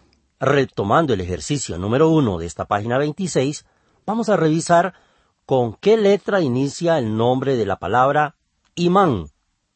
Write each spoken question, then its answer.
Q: ¿con qué letra inicia el nombre de la palabra imán?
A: ¡Ajá! Usted contestó que con I y está en lo correcto.